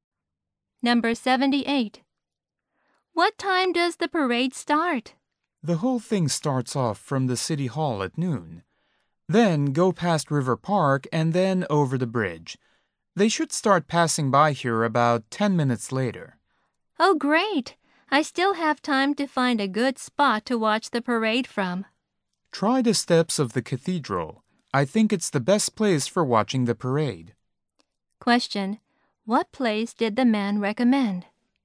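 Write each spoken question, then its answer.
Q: What place did the man recommend?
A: The steps of the cathedral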